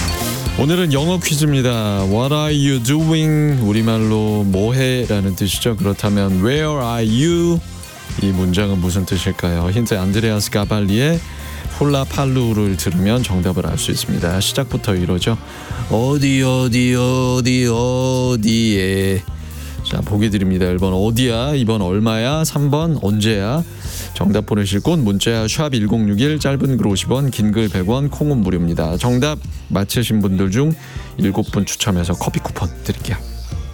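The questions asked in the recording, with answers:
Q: 그렇다면 Where are you? 이 문장은 무슨 뜻일까요?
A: 1: 어디야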